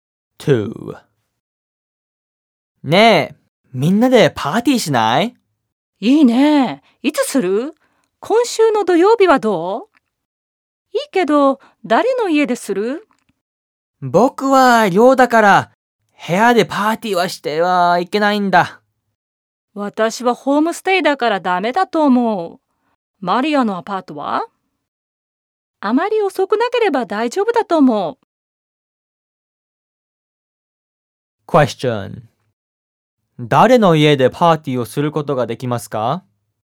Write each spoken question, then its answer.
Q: 誰の家でパーティーをすることができますか?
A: マリアのアパートでパーティーをすることができます。